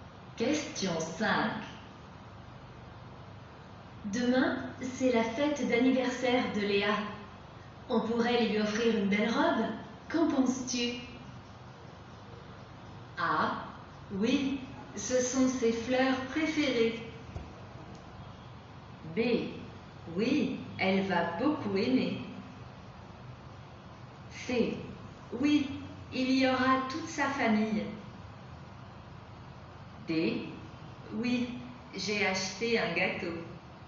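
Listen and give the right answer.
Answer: B: Oui, elle va beaucoup aimer.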